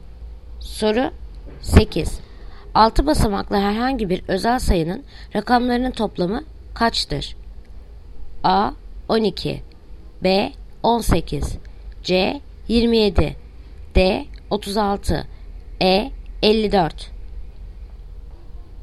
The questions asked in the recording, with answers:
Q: 6 basamaklı herhangi bir özel sayının rakamlarının toplamı kaçtır?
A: Yanıt Ceyhan. 27.